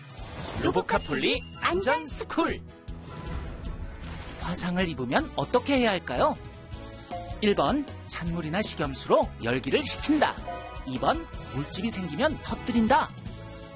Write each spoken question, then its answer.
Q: 화상을 입으면 어떻게 해야 할까요?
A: 정답은 1번. 찬물이나 식염수로 열기를 식히고 깨끗한 거즈로 상처 부위를 감싸줘요.